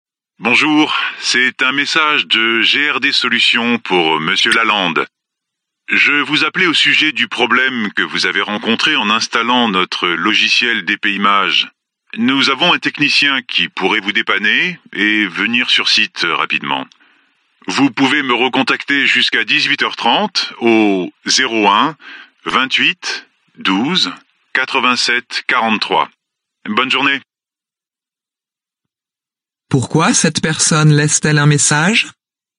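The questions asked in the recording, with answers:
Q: Pourquoi cette personne laisse-t-elle un message?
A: Pour proposer l'intervention d'un technicien afin de résoudre le problème d'installation du logiciel DPImage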